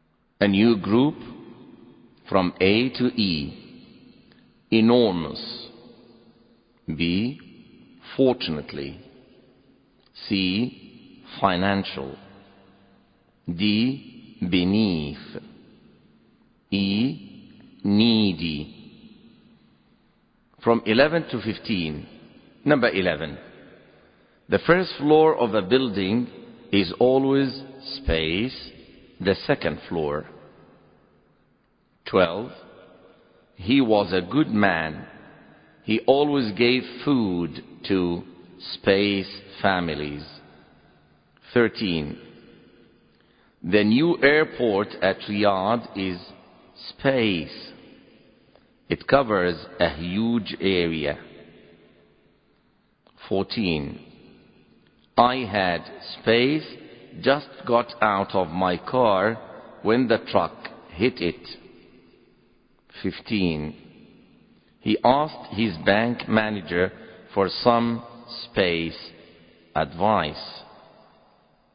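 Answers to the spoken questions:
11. D: beneath
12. E: needy
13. A: enormous
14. B: fortunately
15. C: financial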